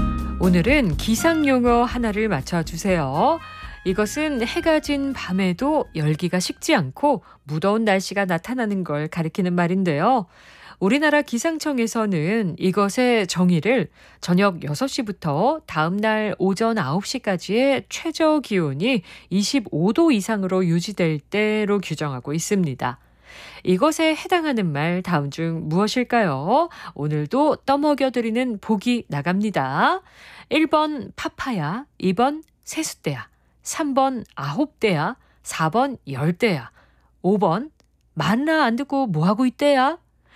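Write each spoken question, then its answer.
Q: 이것에 해당하는 말 다음 중 무엇일까요?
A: 4번: 열대야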